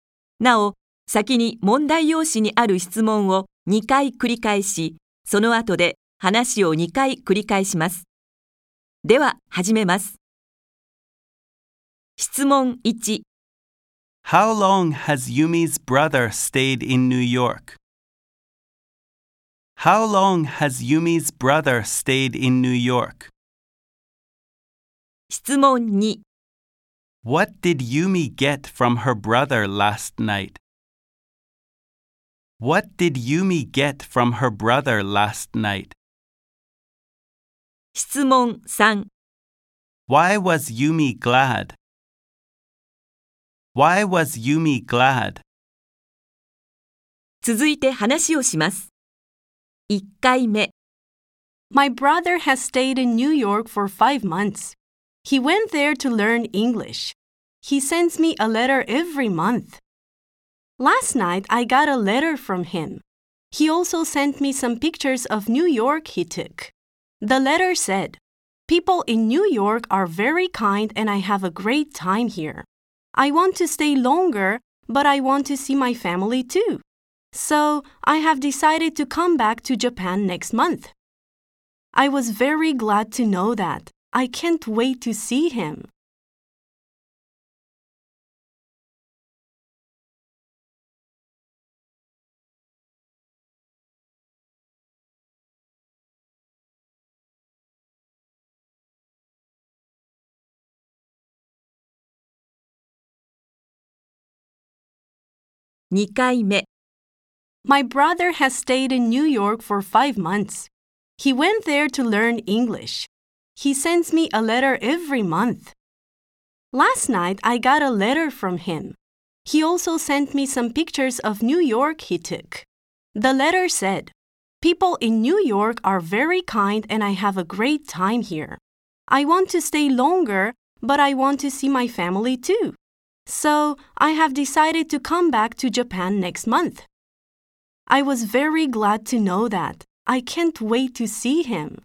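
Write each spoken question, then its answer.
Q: How long has Yumi's brother stayed in New York?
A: For 5 months.

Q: What did Yumi get from her brother last night?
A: A letter and some pictures of New York.

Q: Why was Yumi glad?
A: Because her brother decided to come back to Japan next month.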